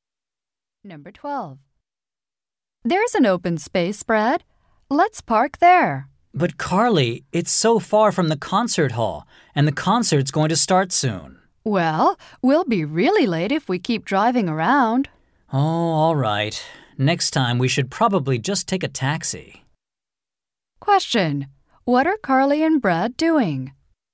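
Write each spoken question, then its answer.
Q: What are Carly and Brad doing?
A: Looking for a parking space before a concert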